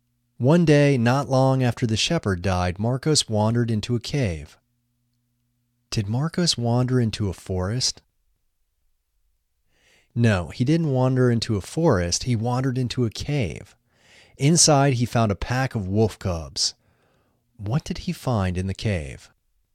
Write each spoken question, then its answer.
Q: What did he find in the cave?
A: He found a pack of wolf cubs in the cave.